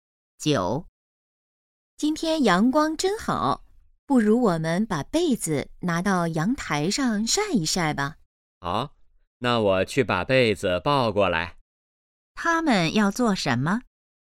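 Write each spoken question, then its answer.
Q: 他们要做什么?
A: 晒被子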